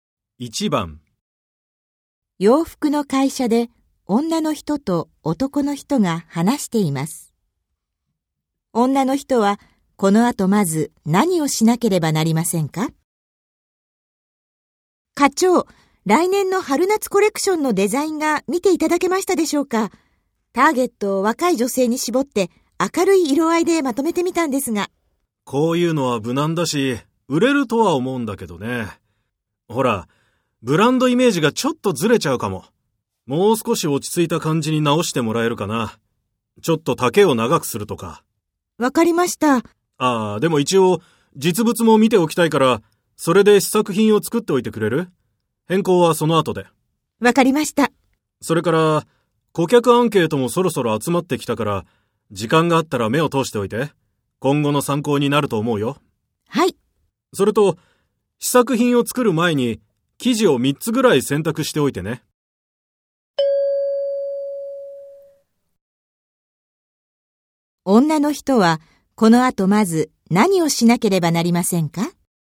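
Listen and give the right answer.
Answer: 生地を3つぐらい選ぶ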